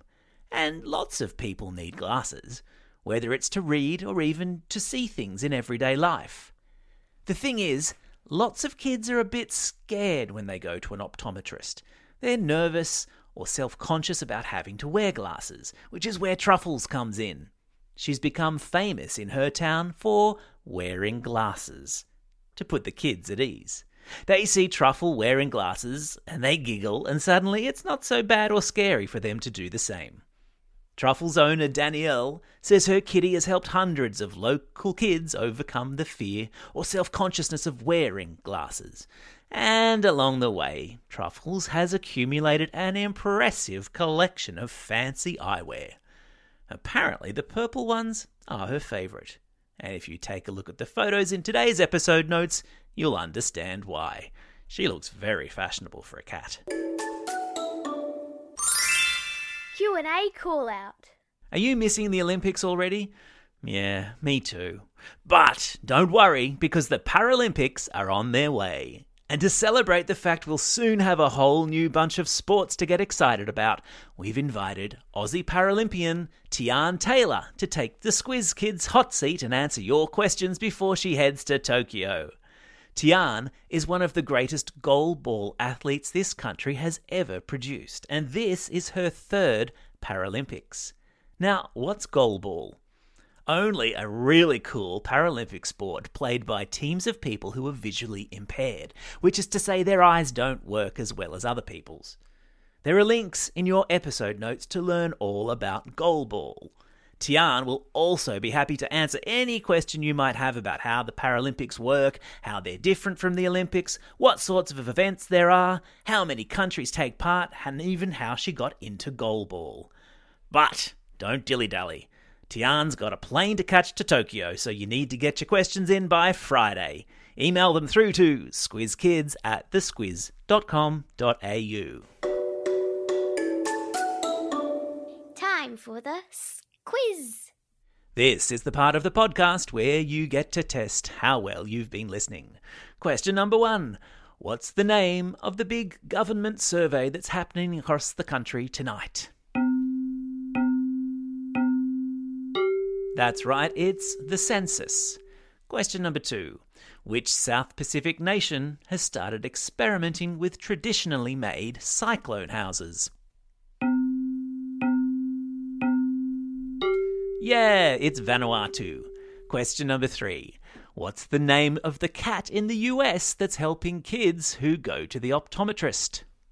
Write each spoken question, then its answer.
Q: What's the name of the cat in the US that's helping kids who go to the optometrist?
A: You got it. Her name's Truffles.